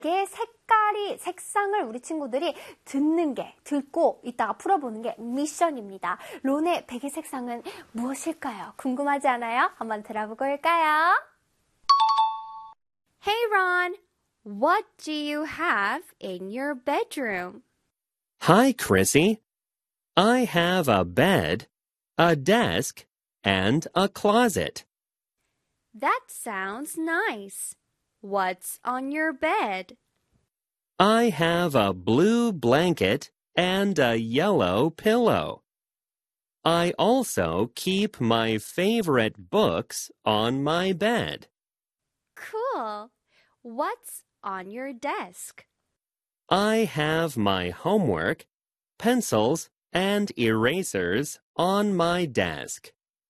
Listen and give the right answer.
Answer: 노란색 베개가 있어